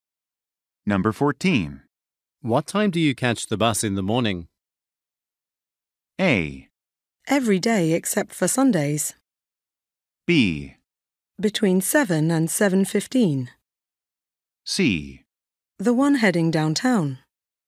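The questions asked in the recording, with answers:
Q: What time do you catch the bus in the morning?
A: B: Between 7 and 7:15.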